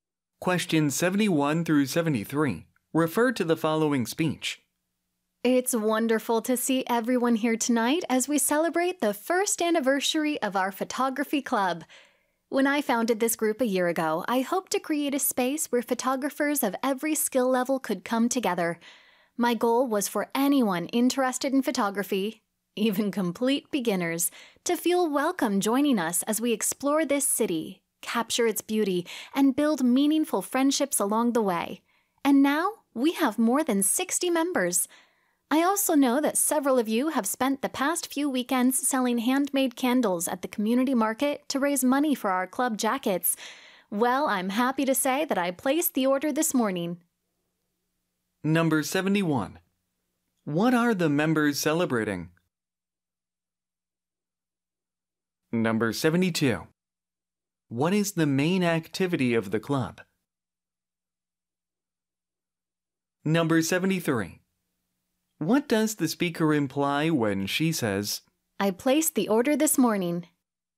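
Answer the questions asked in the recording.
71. The first anniversary of their photography club
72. Photography, exploring and photographing the city
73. Enough money was raised for the club jackets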